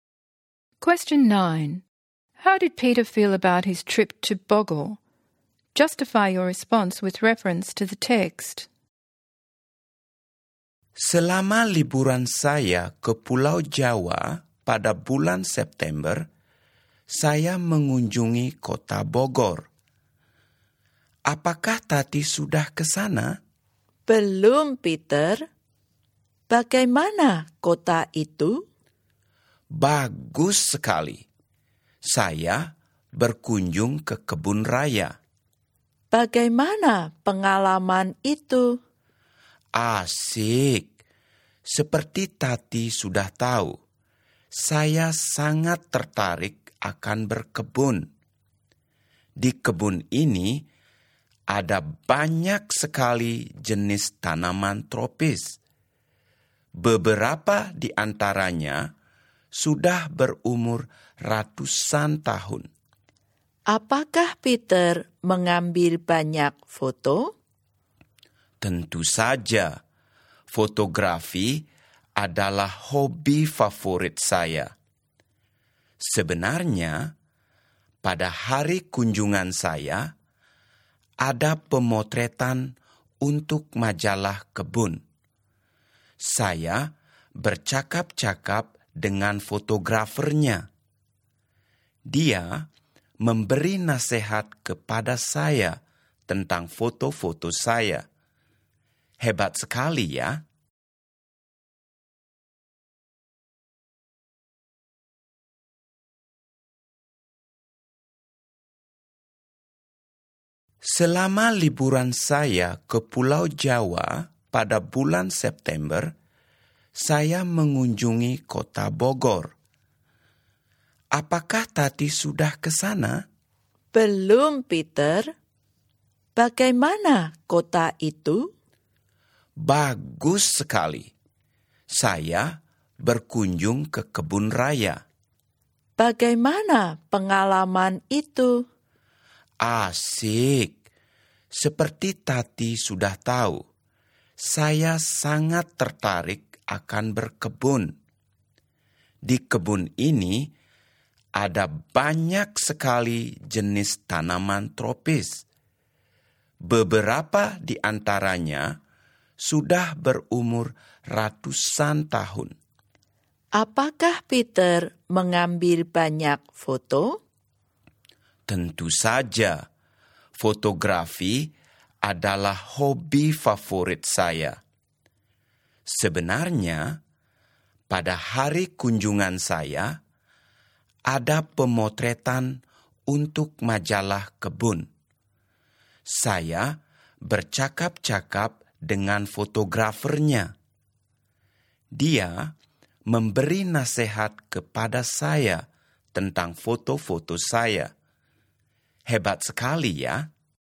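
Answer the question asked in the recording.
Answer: Very positive: he loves gardening and saw many tropical plants in the botanical gardens, and as a keen photographer he got advice from a magazine photographer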